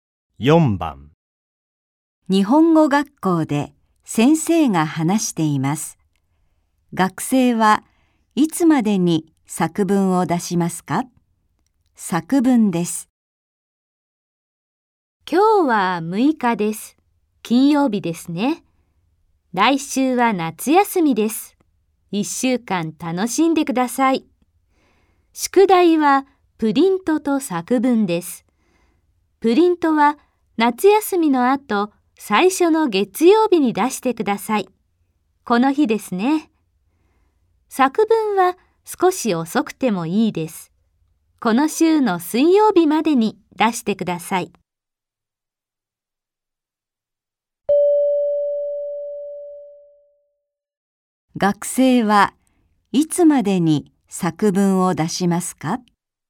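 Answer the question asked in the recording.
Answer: 夏休みのあとの週の水曜日(18日)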